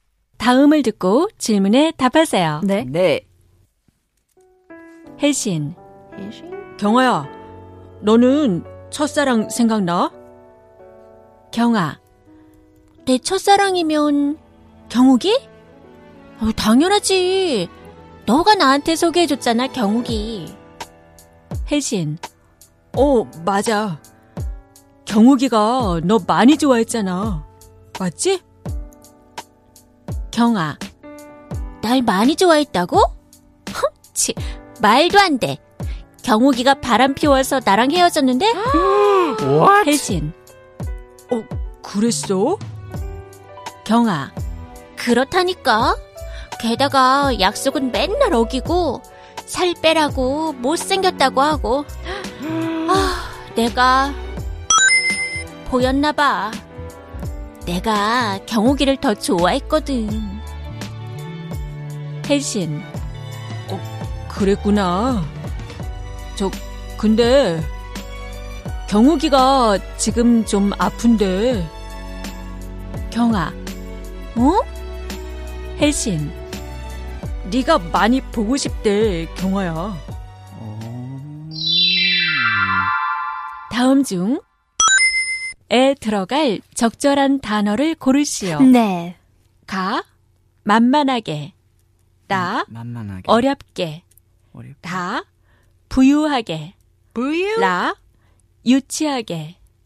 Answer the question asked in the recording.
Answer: But really, the answer that we were going for, and it turns out to be the correct answer, is 만만하게.